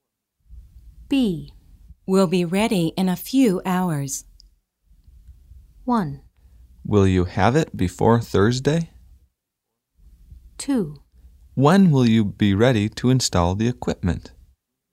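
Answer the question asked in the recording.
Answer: 2: When will you be ready to install the equipment?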